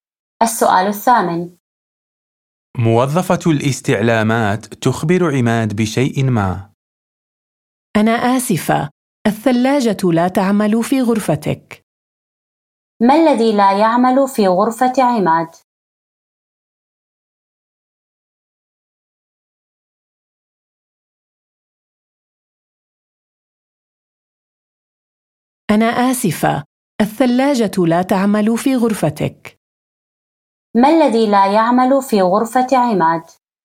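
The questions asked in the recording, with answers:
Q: ما الذي لا يعمل في غرفة عماد؟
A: الثلاجة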